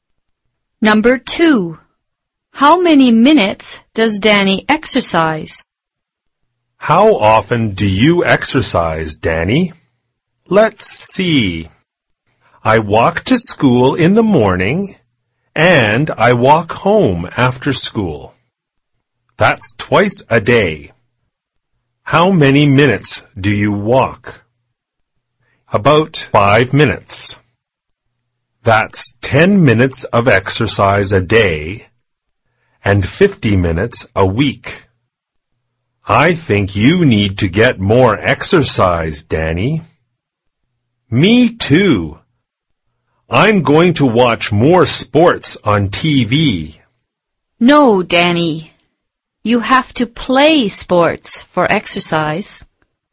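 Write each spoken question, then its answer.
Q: How many minutes does Danny exercise?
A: 10 minutes a day (50 minutes a week)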